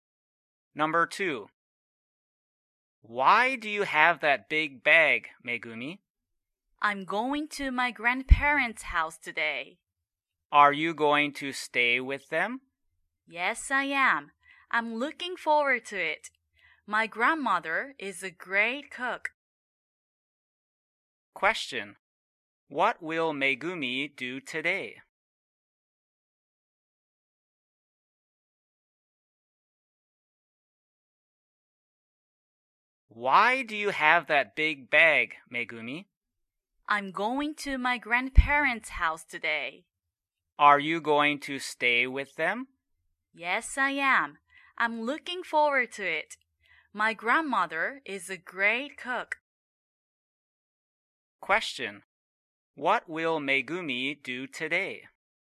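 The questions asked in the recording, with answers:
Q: What will Megumi do today?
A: Go to her grandparents' house and stay with them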